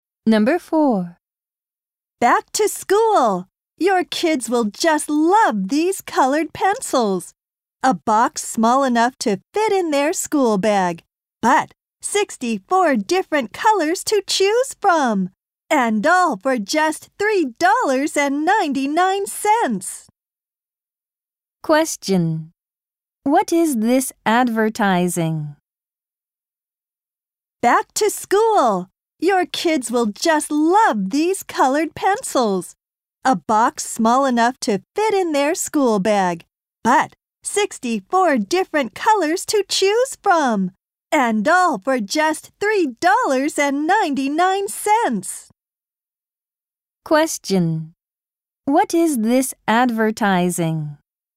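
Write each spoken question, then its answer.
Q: What is this advertising?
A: colored pencils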